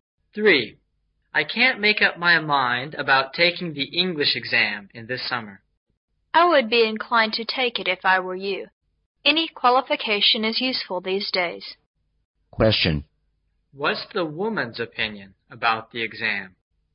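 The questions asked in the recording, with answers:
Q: What's the woman's opinion about the exam?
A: He should take it; any qualification is useful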